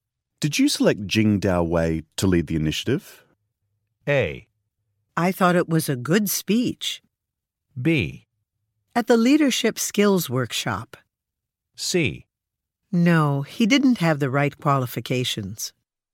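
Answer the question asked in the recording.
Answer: C: No, he didn't have the right qualifications.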